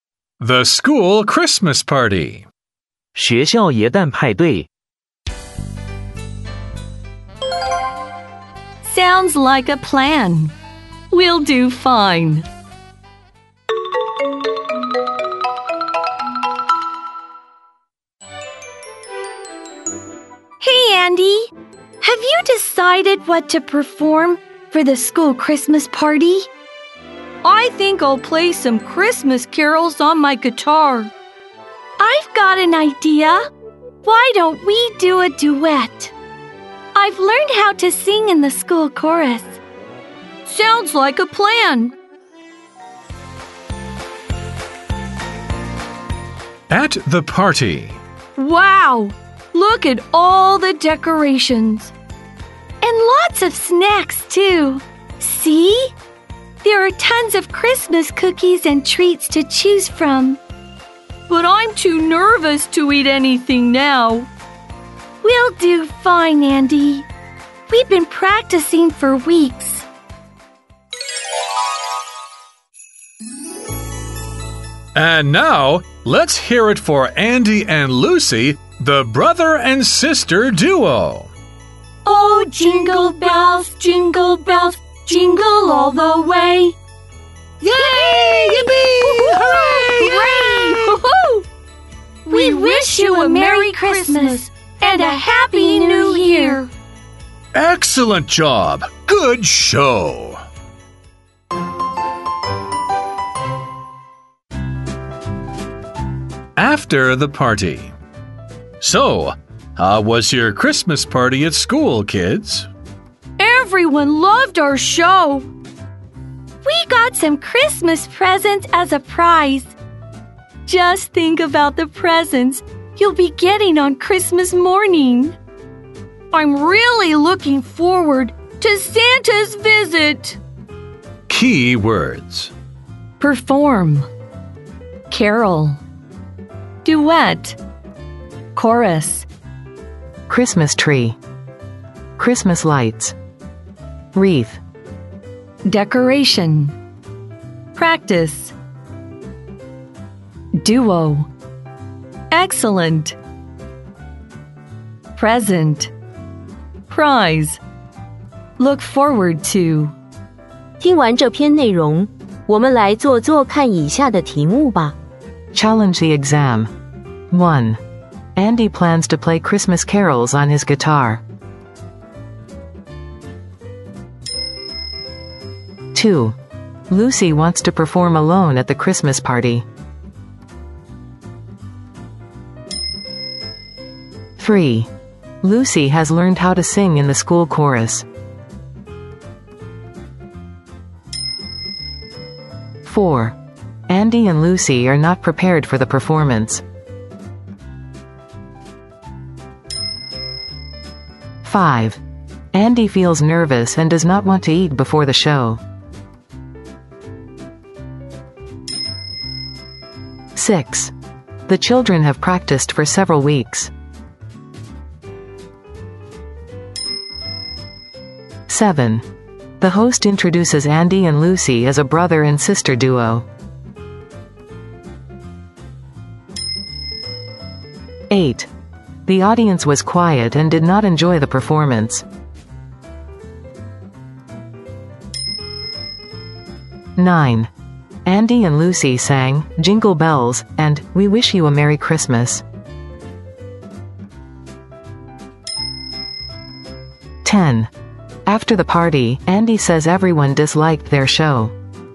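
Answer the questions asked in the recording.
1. True
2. False
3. True
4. False
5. True
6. True
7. True
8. False
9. True
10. False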